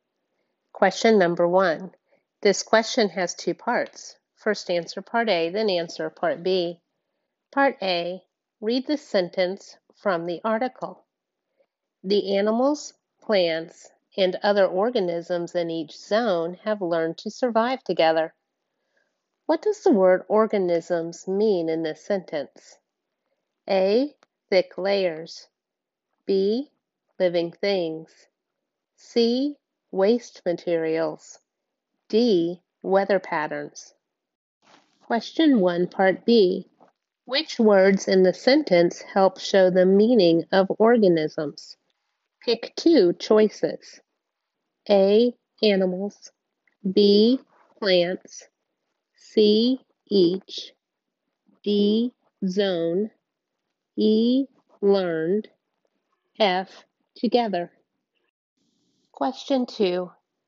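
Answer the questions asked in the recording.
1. B: Living things
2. A: Animals; B: Plants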